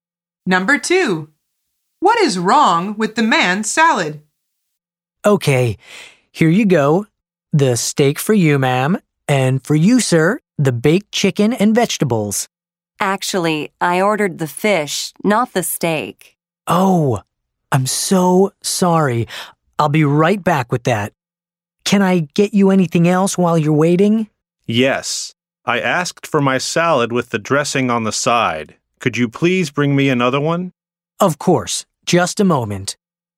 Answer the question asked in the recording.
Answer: The answer is he ordered dressing on the side.